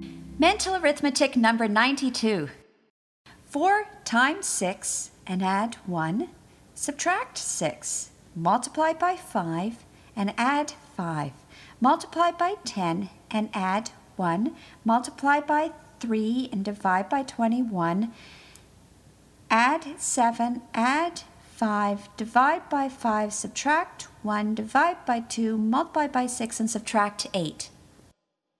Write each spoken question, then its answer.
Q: 4 times 6 and add 1. Subtract 6. Multiply by 5 and add 5. Multiply by 10 and add 1. Multiply by 3 and divide by 21. Add 7, add 5, divide by 5, subtract 1, divide by 2, multiply by 6, and subtract 8.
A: And the answer is 82.